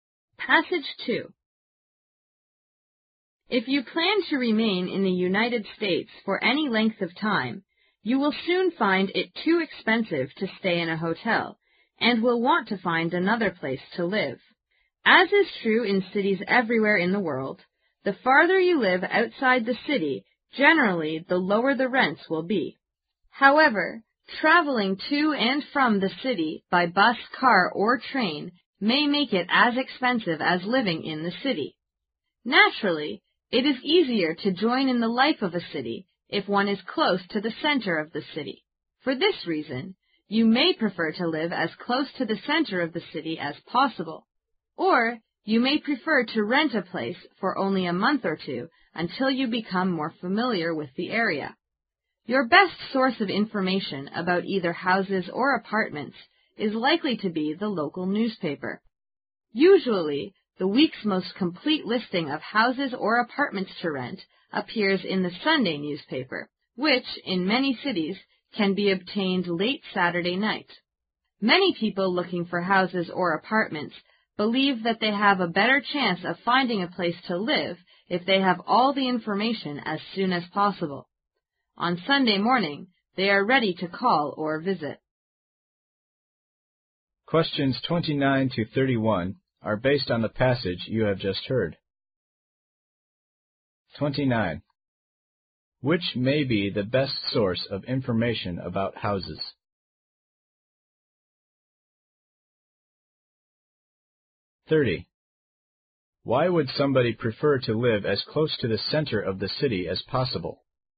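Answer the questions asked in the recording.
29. The local newspaper
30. It is easier to join in the life of the city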